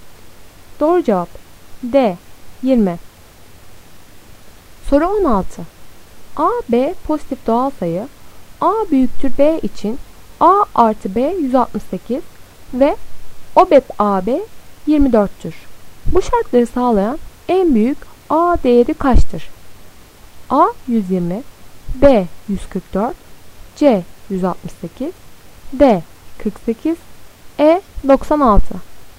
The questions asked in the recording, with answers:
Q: Bu şartları sağlayan en büyük A değeri kaçtır?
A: Doğru cevap B 144.